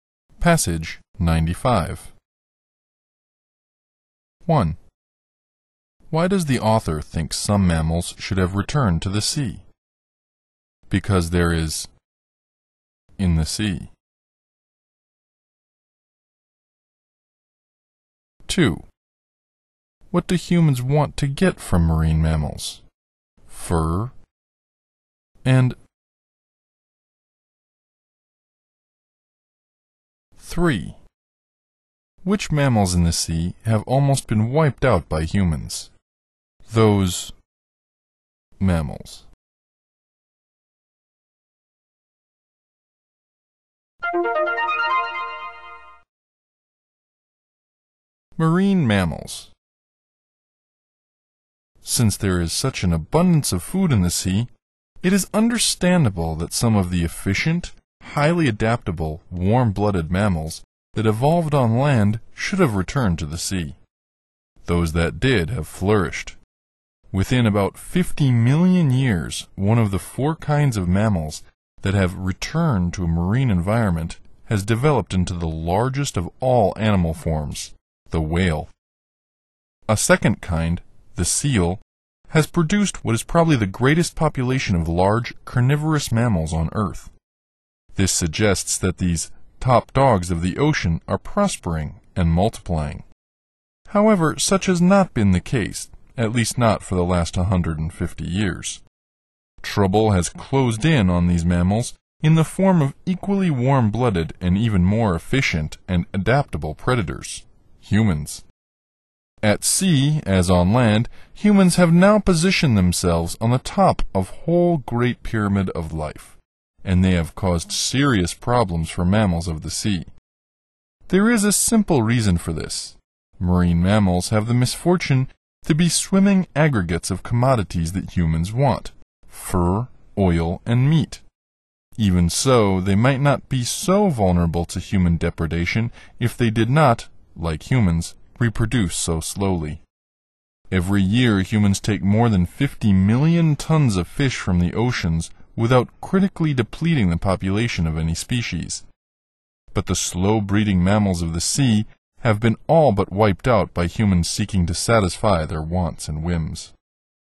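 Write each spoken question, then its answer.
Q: Why does the author think some mammals should have returned to the sea?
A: Because there is an abundance of food in the sea.

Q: What do humans want to get from marine mammals?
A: Fur, oil, and meat.

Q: Which mammals in the sea have almost been wiped out by humans?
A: The slow-breeding mammals.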